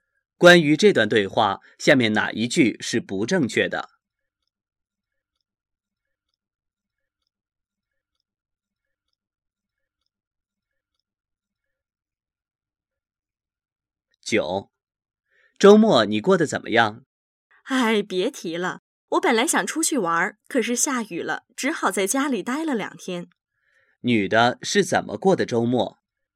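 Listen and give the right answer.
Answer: 因为下雨,在家里待了两天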